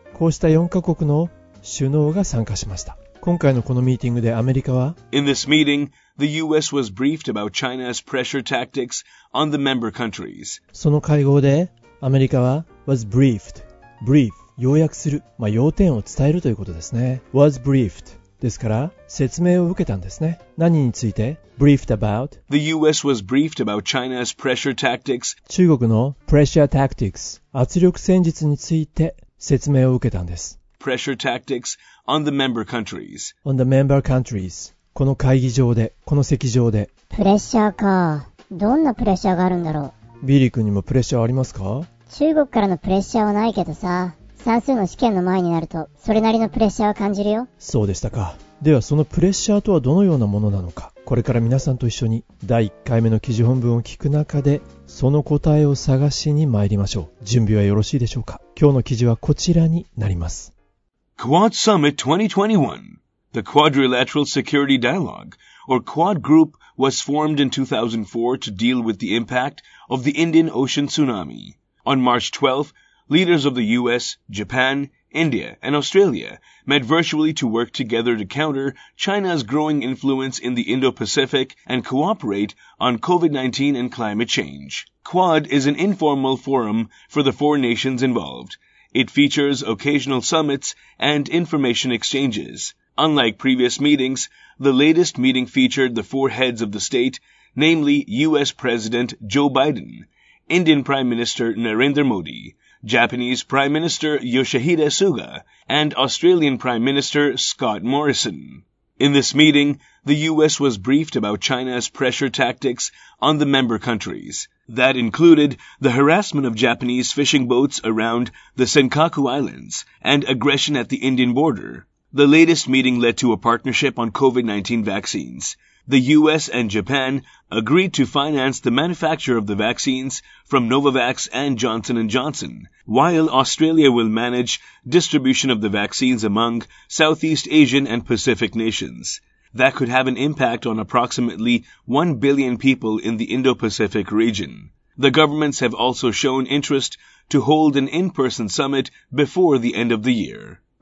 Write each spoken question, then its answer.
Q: ではそのプレッシャーとはどのようなものなのか。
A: That included the harassment of Japanese fishing boats around the Senkaku Islands and aggression at the Indian border.